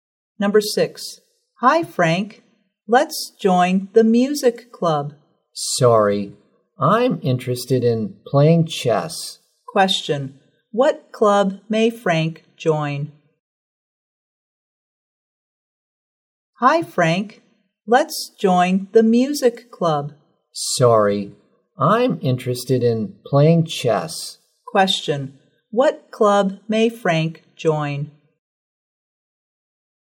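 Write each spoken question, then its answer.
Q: What club may Frank join?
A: The chess club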